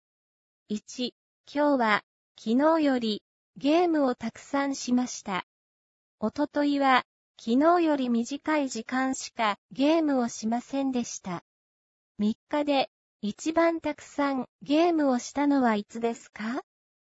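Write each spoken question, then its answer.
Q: 三日で、一番たくさん、ゲームをしたのはいつですか?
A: 今日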